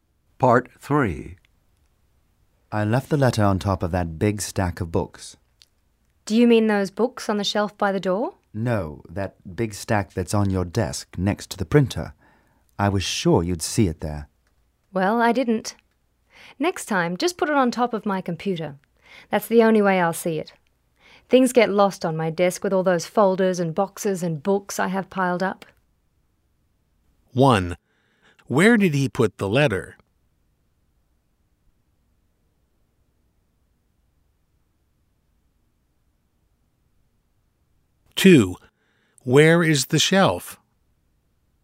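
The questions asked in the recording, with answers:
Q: Where did he put the letter?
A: On top of the big stack of books on her desk

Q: where is the shelf?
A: By the door

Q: where does the woman want the man to put the letter?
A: On top of her computer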